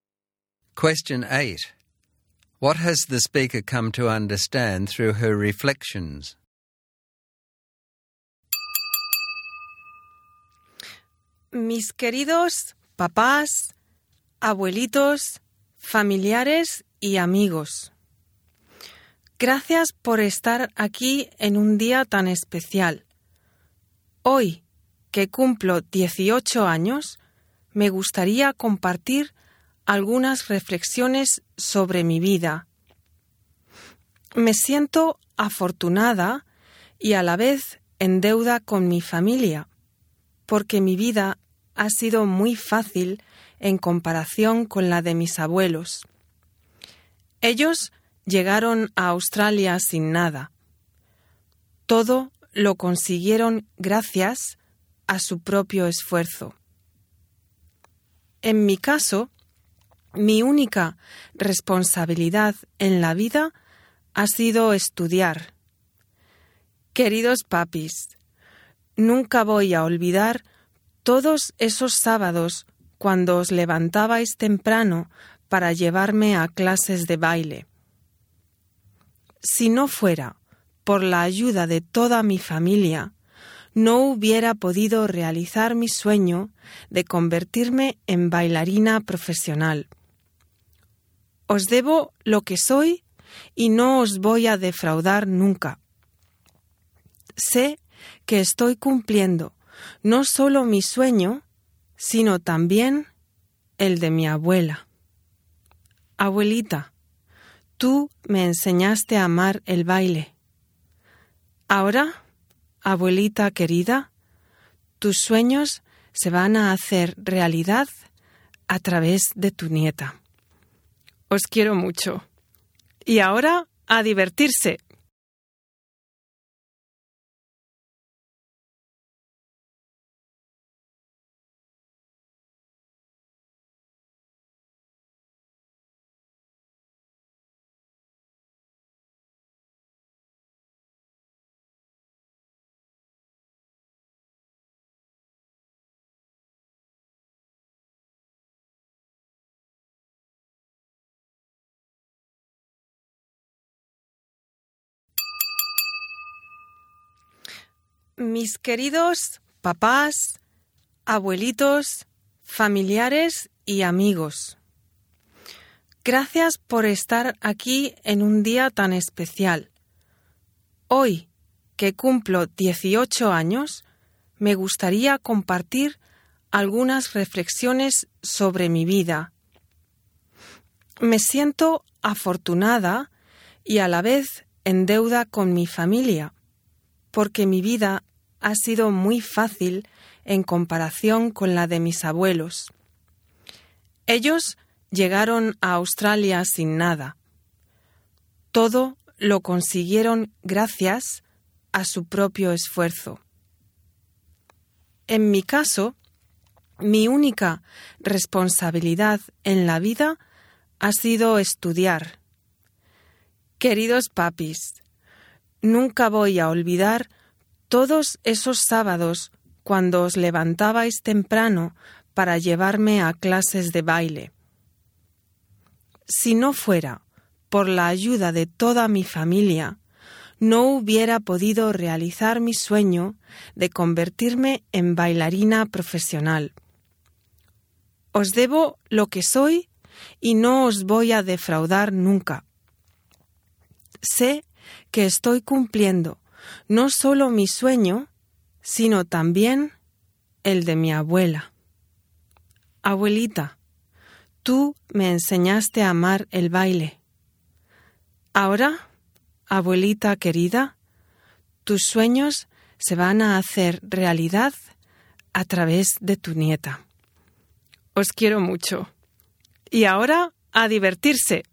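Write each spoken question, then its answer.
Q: What has the speaker come to understand through her reflections?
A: That she is lucky and owes her family: her life has been easy compared with her grandparents', and with her family's help she is fulfilling her dream, and her grandmother's dream, of becoming a professional dancer.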